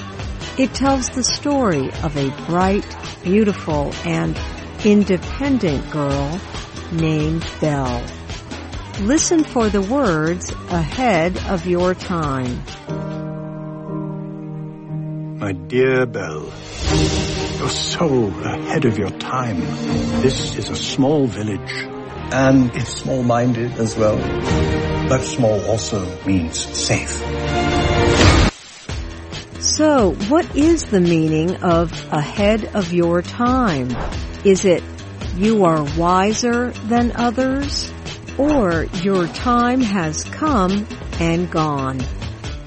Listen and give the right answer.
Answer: Ahead of your time means you are wiser than others.